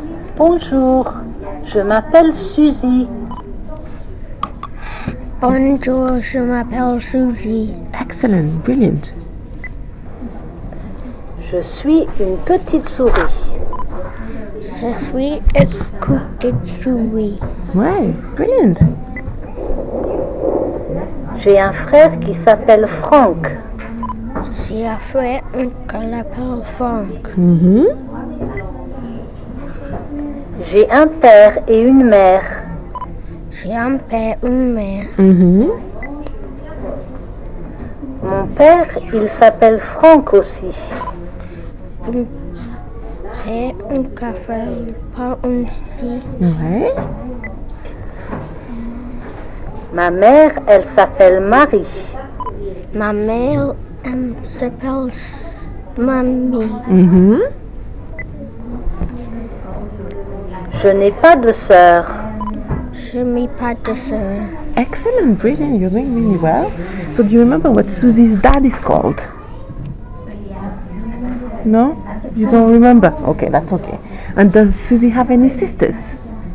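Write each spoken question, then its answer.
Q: So do you remember what Susie's dad is called?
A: Franck

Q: And does Susie have any sisters?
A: No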